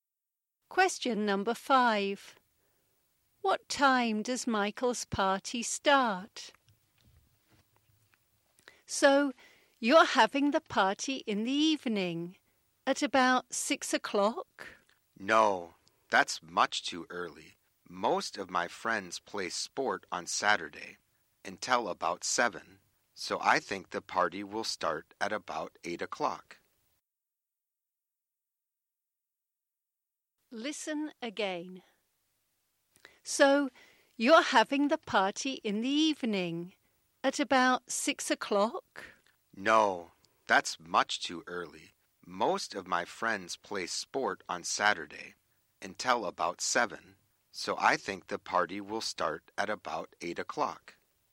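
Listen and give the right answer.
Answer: At about 8 o'clock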